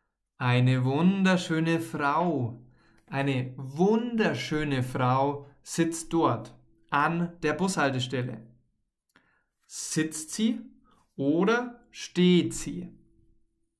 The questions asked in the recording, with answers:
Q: Sitzt sie oder steht sie?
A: Sie sitzt. Die Frau sitzt.